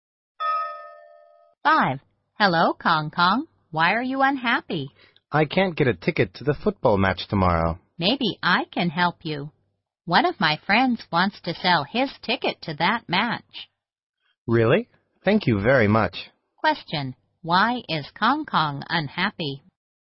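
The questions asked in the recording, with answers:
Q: Why is Kong Kong unhappy?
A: He can't get a ticket to the football match tomorrow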